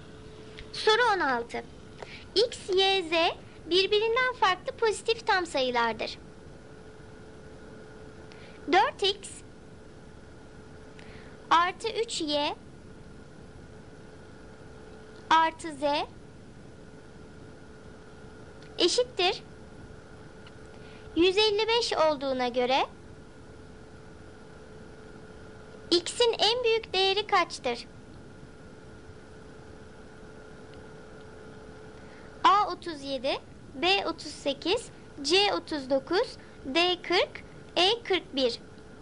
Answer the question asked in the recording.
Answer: Doğru cevap A 37.